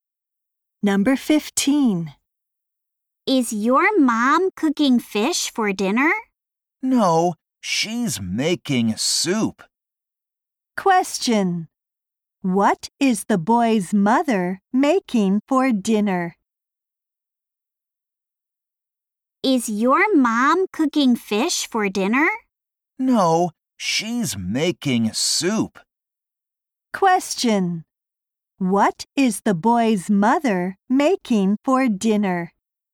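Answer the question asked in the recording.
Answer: Soup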